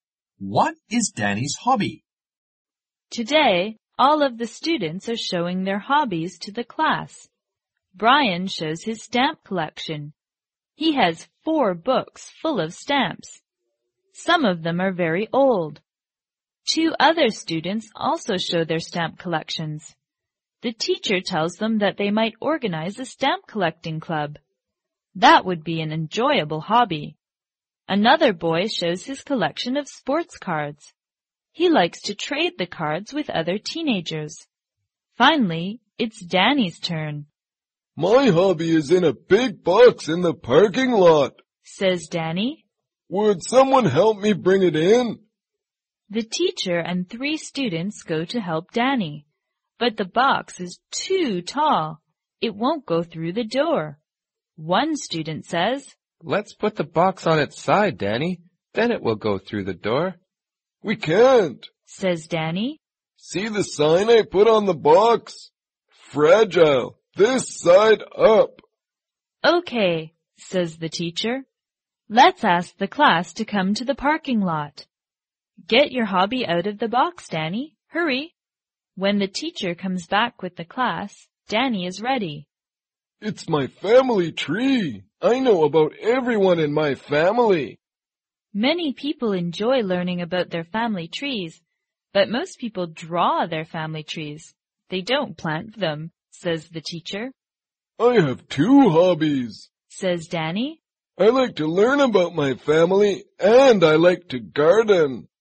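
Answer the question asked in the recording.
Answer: Learning about his family (his family tree) and gardening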